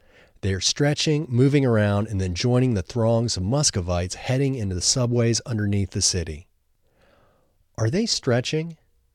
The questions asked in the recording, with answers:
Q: Are they stretching?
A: Yes, they are stretching.